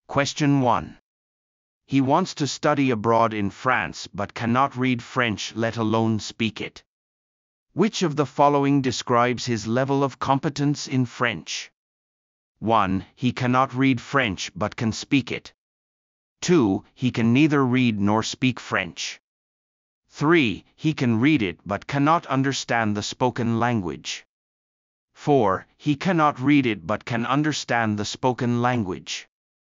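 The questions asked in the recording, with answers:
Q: Which of the following describes his level of competence in French?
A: 2: He can neither read nor speak French.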